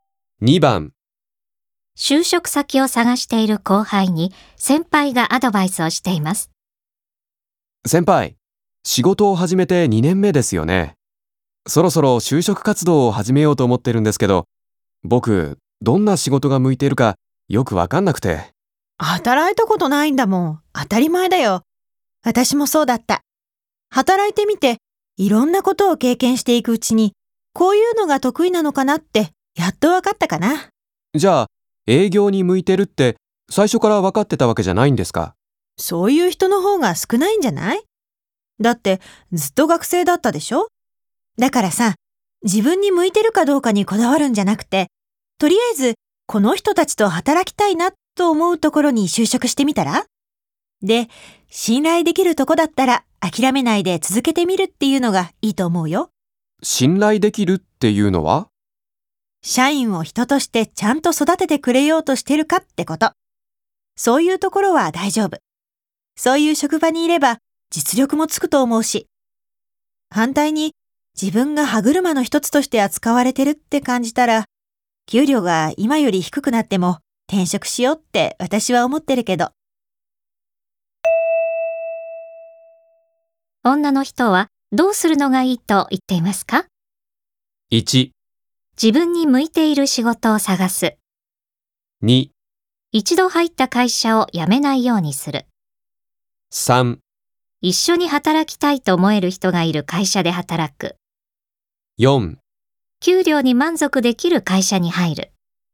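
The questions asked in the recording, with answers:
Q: 女の人はどうするのがいいと言っていますか?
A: 3: 一緒に働きたいと思える人がいる会社で働く。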